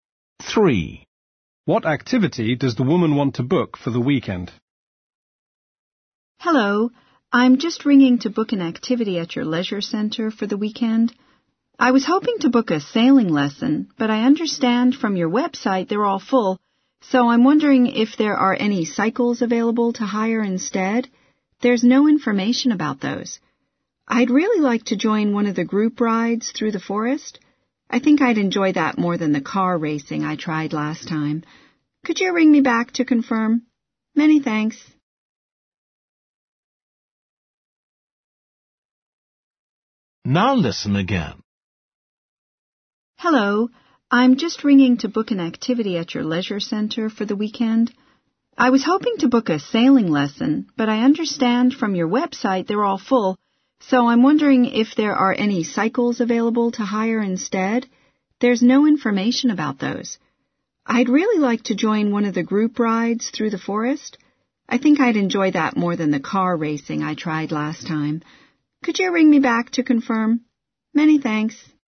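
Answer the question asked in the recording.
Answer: cycling (a group bike ride through the forest)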